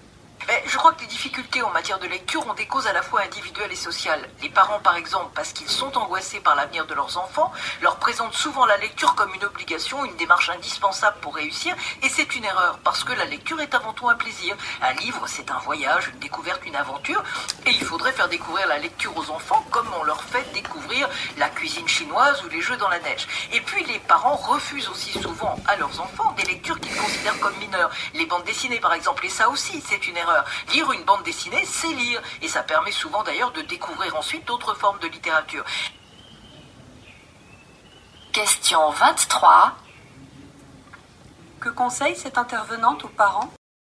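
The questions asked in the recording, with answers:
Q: Que conseille cette intervenante aux parents ?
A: Présenter la lecture comme un plaisir et accepter des lectures comme les bandes dessinées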